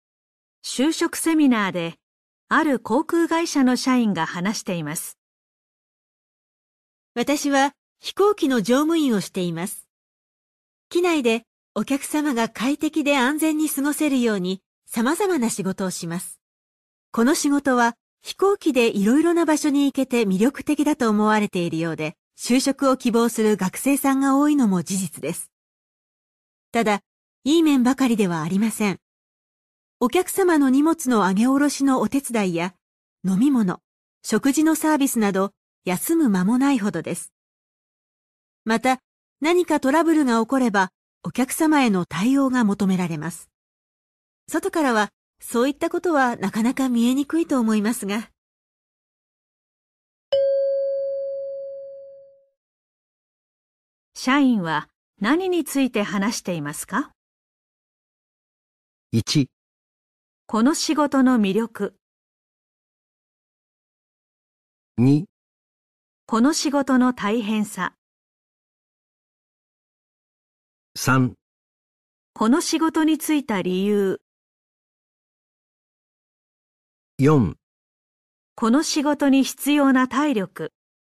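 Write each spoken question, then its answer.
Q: 社員は何について話していますか?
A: 2: この仕事の大変さ。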